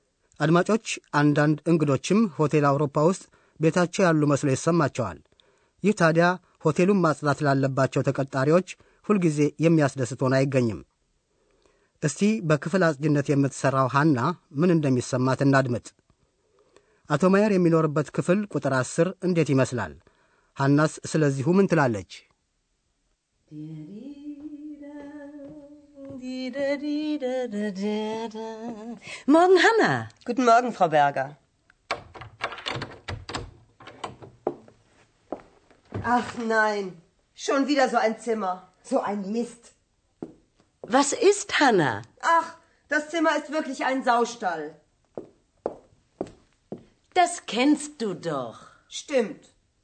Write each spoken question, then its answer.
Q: አቶ ማየር የሚኖርበት ክፍል ቁጥር ዐሥር እንዴት ይመስላል?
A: ሐና ክፍሉን የከብት በረት መስሎ ነው ያገኘችው።